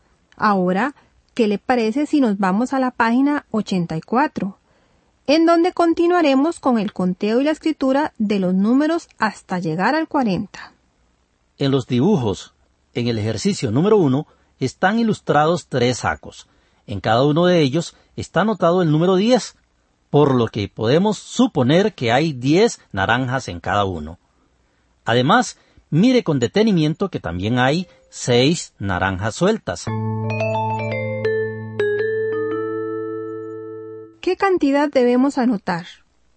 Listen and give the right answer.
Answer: Por supuesto, lo correcto es escribir en el recuadro el número 36.